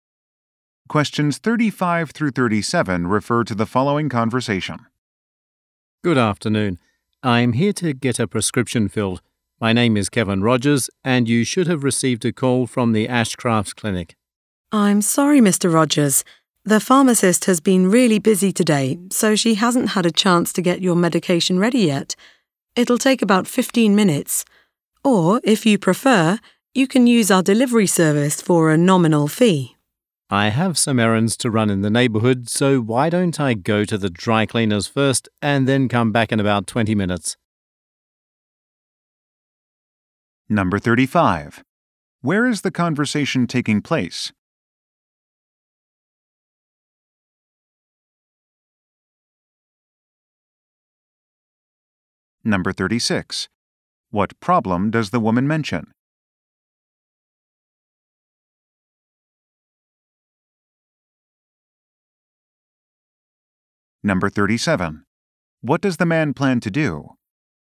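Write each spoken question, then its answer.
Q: Where is the conversation taking place?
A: At a pharmacy

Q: What problem does the woman mention?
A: The medication is not ready yet

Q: What does the man plan to do?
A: Go to the dry cleaners and come back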